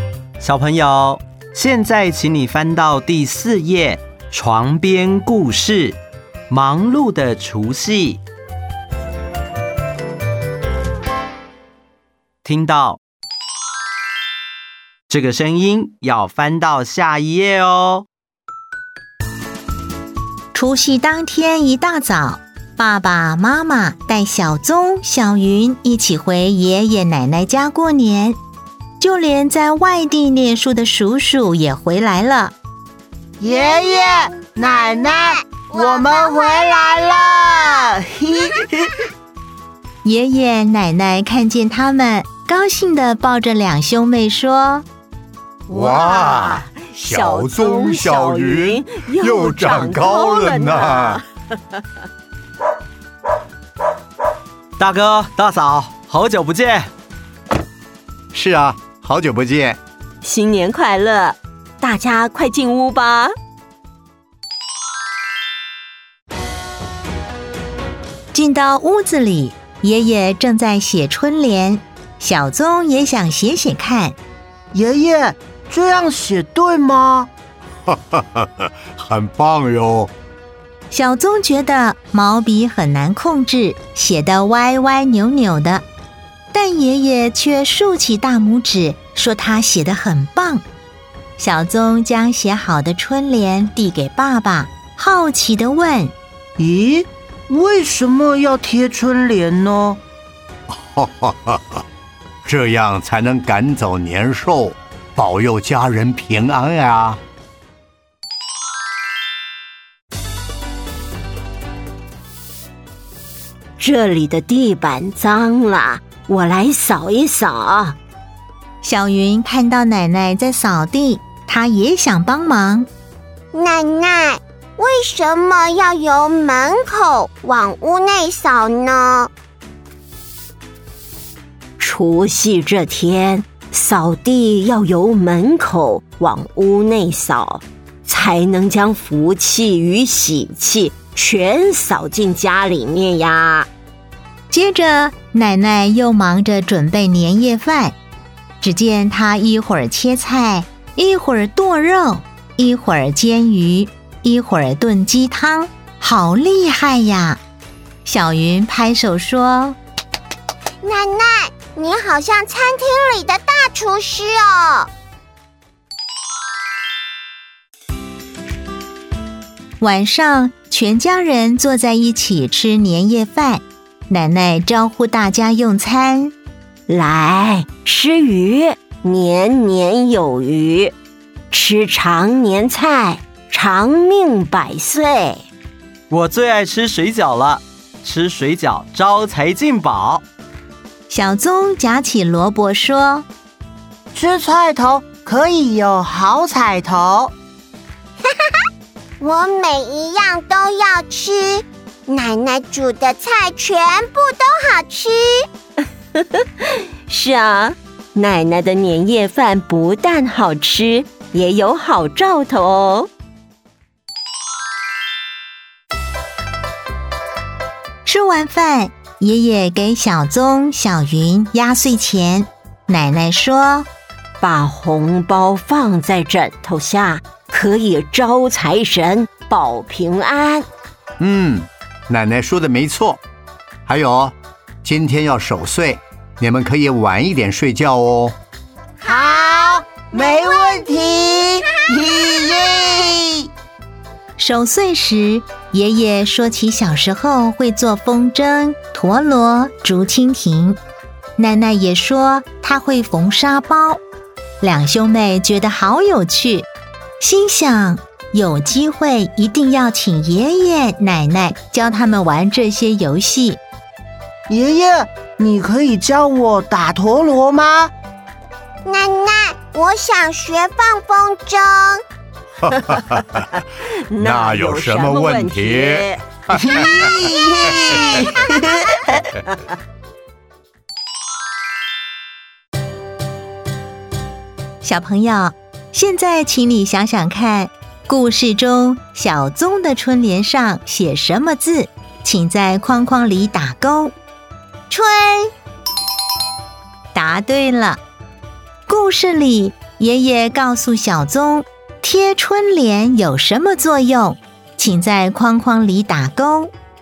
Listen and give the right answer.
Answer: 赶走年兽。